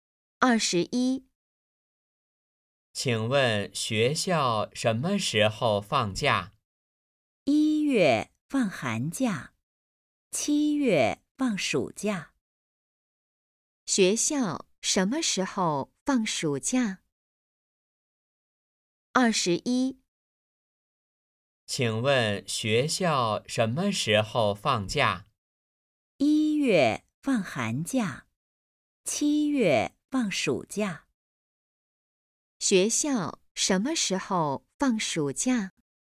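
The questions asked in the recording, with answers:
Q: 学校什么时候放暑假?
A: 七月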